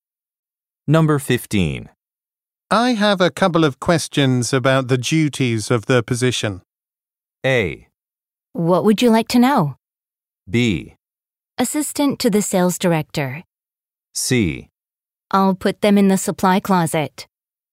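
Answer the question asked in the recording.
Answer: A: What would you like to know?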